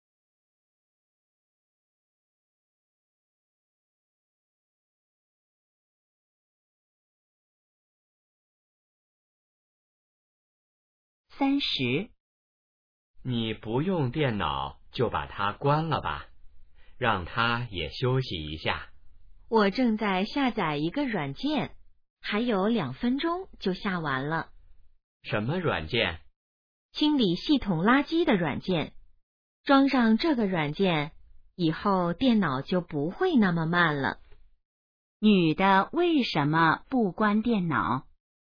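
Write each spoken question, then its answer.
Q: 女的为什么不关电脑?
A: 正在下载软件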